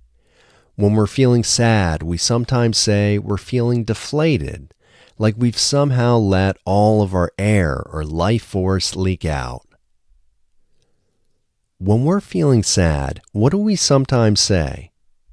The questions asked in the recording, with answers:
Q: When we're feeling sad, what do we sometimes say?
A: When we're feeling sad, we sometimes say we're feeling deflated.